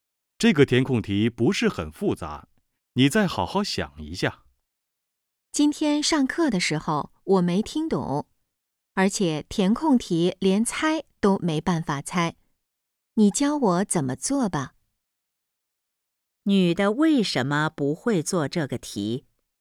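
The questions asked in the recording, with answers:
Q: 女的为什么不会做这个题?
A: 上课时没听懂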